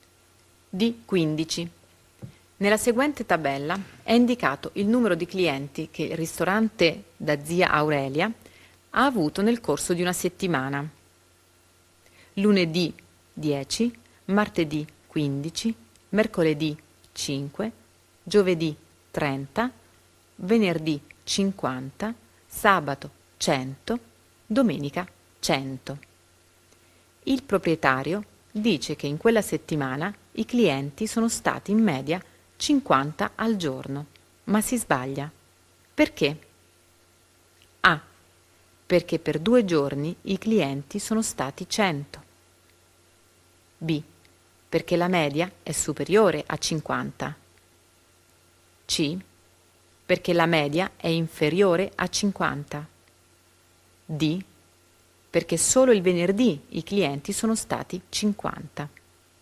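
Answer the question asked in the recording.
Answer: C: Perché la media è inferiore a 50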